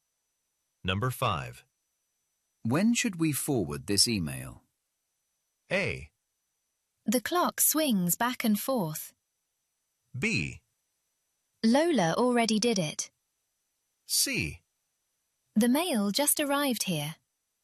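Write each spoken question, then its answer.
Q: When should we forward this email?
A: B: Lola already did it.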